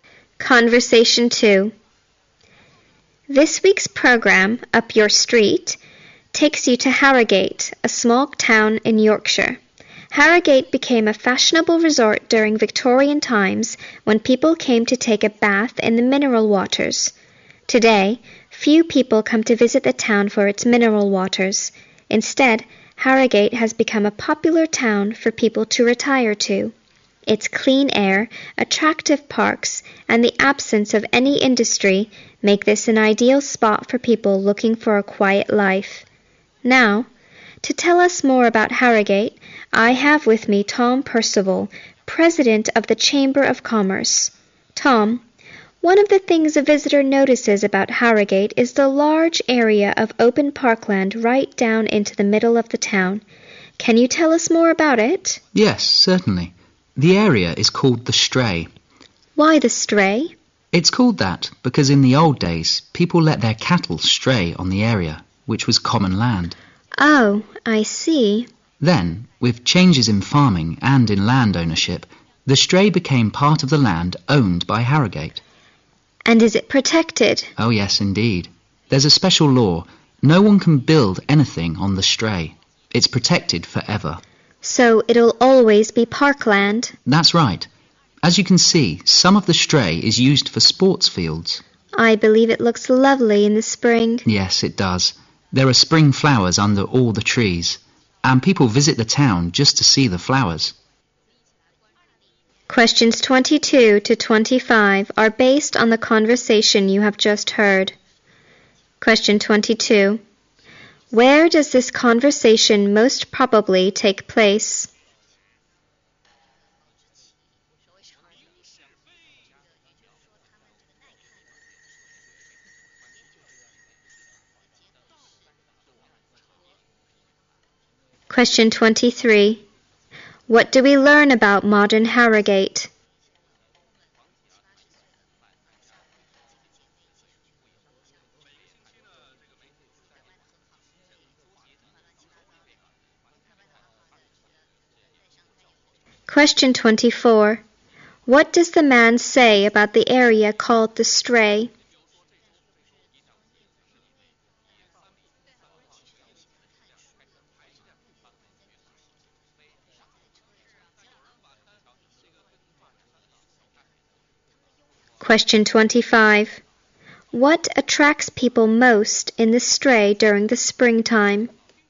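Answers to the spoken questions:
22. In a radio studio (on a program)
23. It has become a popular place for people to retire to
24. It is protected by law and will always be parkland
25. The spring flowers under the trees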